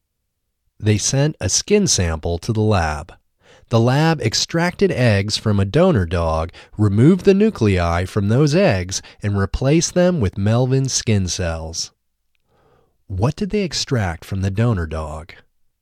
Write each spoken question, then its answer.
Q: What did they extract from the donor dog?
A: They extracted eggs from the donor dog.